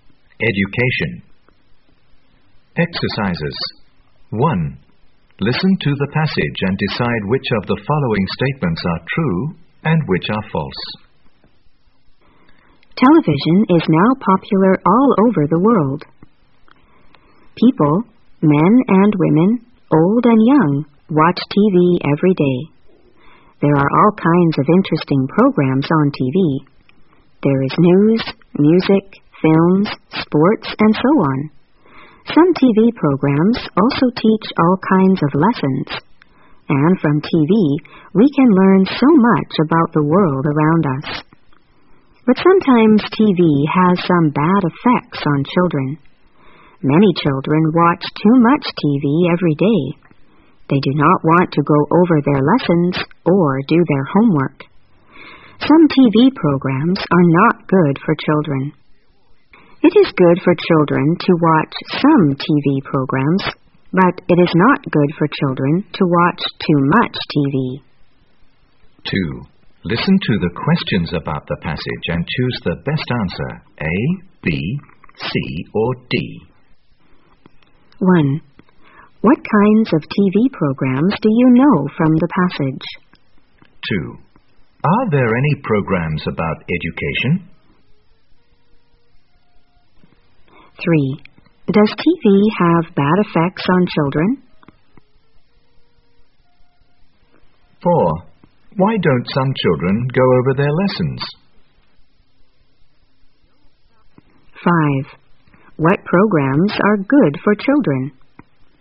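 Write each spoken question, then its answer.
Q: What kinds of TV programs do you know from the passage?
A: News, music, films, sports, and lessons

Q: Are there any programs about education?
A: Yes, some programs teach all kinds of lessons

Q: Does TV have bad effects on children?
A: Yes, sometimes

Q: Why don't some children go over their lessons?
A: Because they watch too much TV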